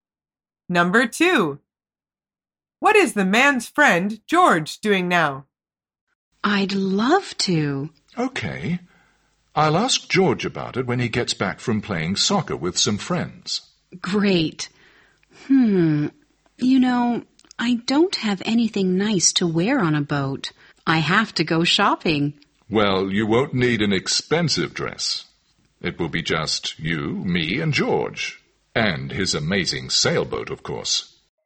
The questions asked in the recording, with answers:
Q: What is the man's friend, George, doing now?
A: The answer is, he's playing soccer.